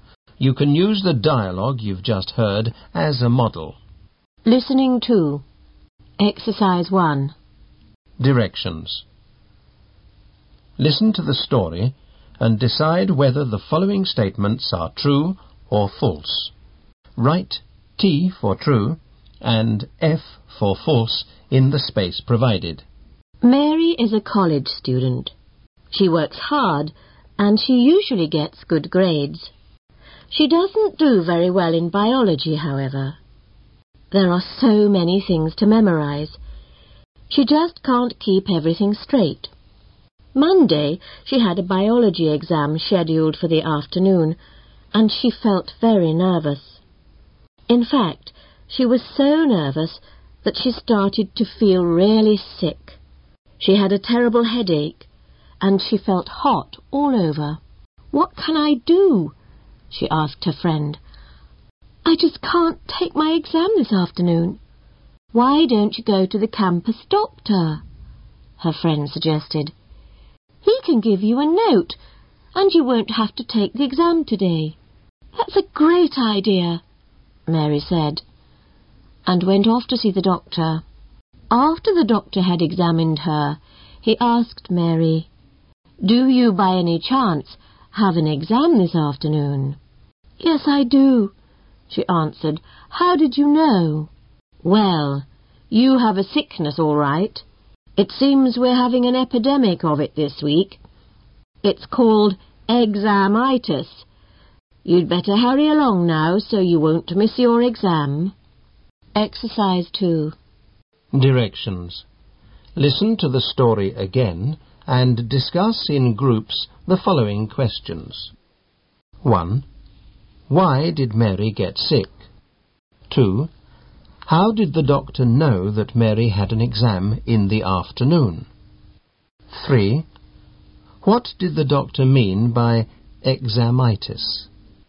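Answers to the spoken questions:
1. She was very nervous about her biology exam.
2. Many students were having the same sickness that week before exams (an epidemic of examitis).
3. Feeling sick from nervousness about an exam.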